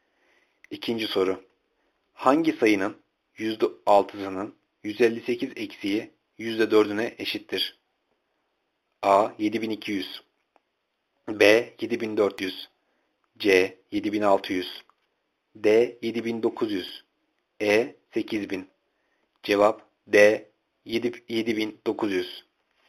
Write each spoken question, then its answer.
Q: Hangi sayının %6'sının 158 eksiği %4'üne eşittir?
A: Cevap D. 7900.